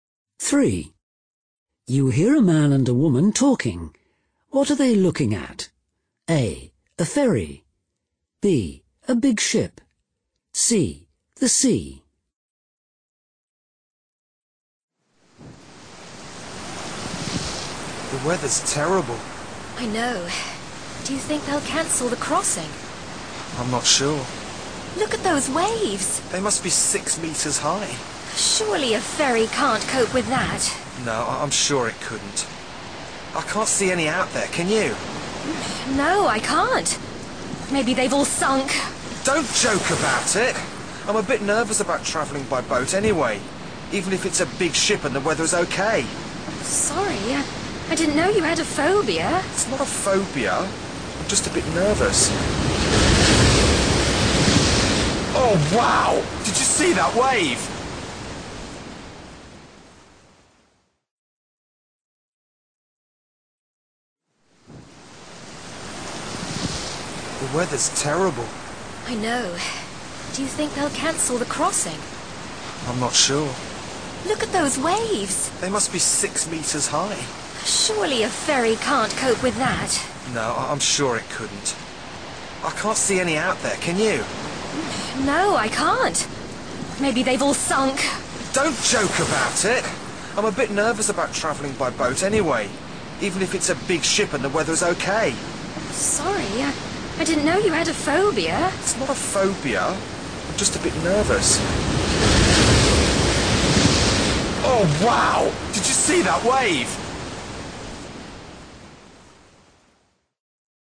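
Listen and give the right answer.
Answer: C: The sea.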